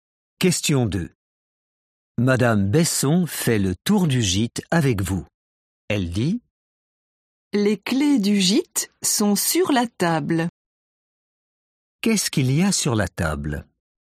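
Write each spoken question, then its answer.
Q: Qu'est-ce qu'il y a sur la table?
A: les clés du gîte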